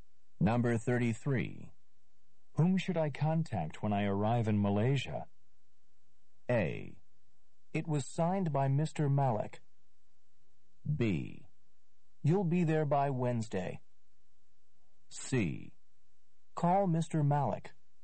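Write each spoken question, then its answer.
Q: Whom should I contact when I arrive in Malaysia?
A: C: Call Mr. Malik.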